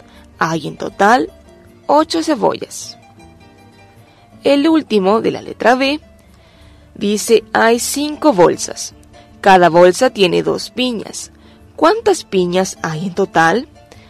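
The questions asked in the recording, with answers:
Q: ¿Cuántas piñas hay en total?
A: 10 piñas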